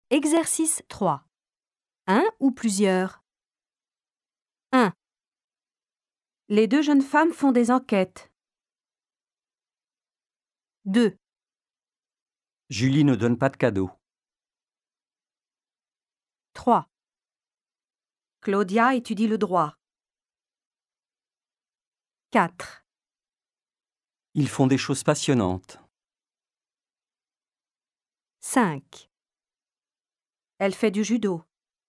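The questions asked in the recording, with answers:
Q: Les deux jeunes femmes font des enquêtes.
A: plusieurs

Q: Julie ne donne pas de cadeaux.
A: un

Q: Claudia étudie le droit.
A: un

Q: Ils font des choses passionnantes.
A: plusieurs

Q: Elle fait du judo.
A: un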